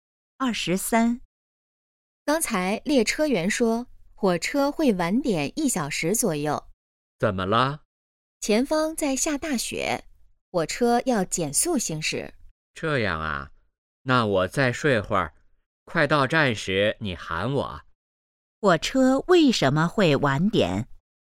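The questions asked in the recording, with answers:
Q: 火车为什么会晚点?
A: 前方下大雪,要减速行驶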